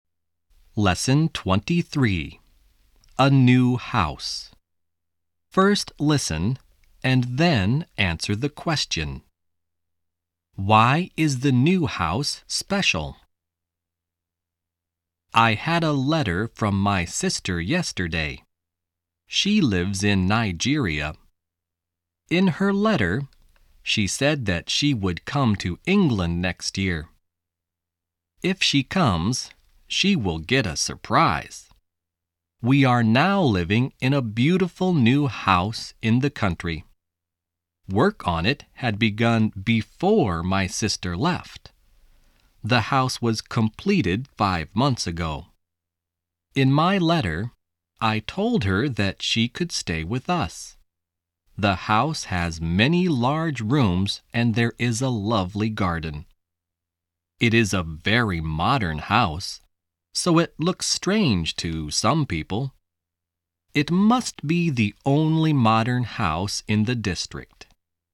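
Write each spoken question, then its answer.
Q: Why is the new house special?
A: It is very modern; it must be the only modern house in the district.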